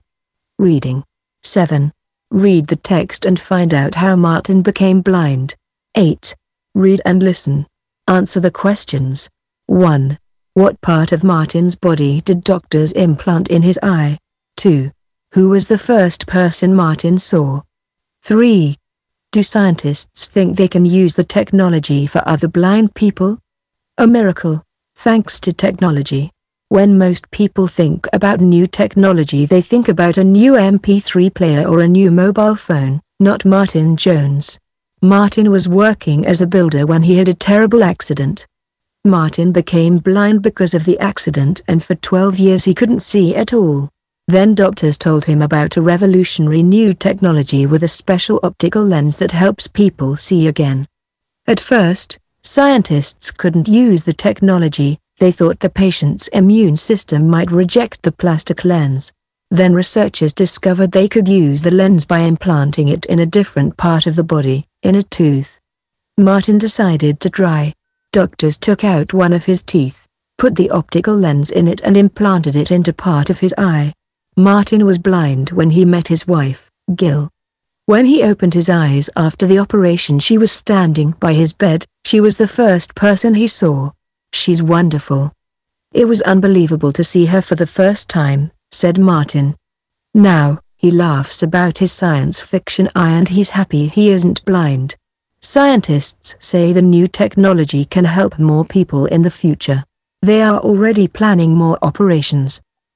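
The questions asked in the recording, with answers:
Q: What part of Martin's body did doctors implant in his eye?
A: One of his teeth (a tooth with an optical lens)

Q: Who was the first person Martin saw?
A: His wife, Gill

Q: Do scientists think they can use the technology for other blind people?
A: Yes, it can help more people in the future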